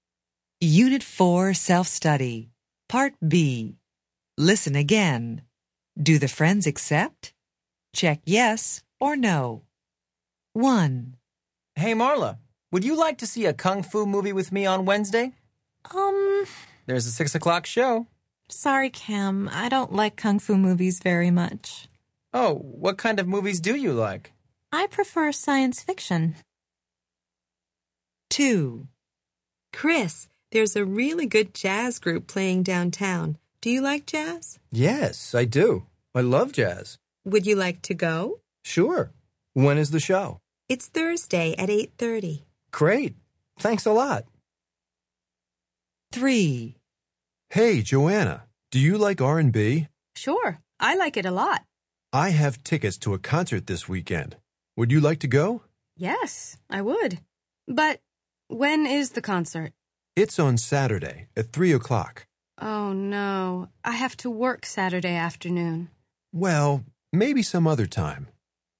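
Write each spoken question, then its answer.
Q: Do the friends accept?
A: No

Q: Do the friends accept?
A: Yes

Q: Do the friends accept?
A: No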